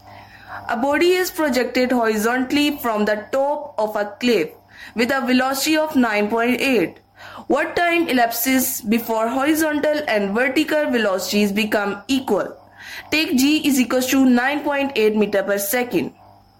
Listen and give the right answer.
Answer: Number D option, 1 second.